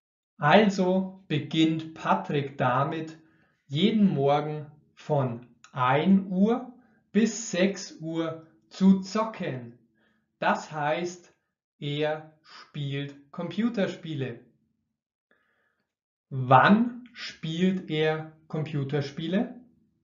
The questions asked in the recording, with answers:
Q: Wann spielt er Computerspiele?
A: jeden Morgen. Er spielt jeden Morgen von 1 Uhr bis 6 Uhr Computerspiele.